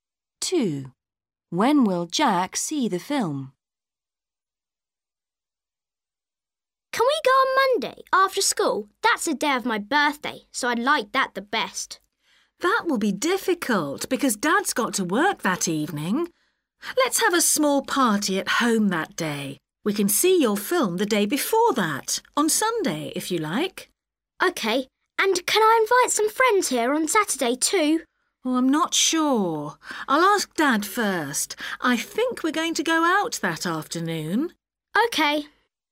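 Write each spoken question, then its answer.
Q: When will Jack see the film?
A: On Sunday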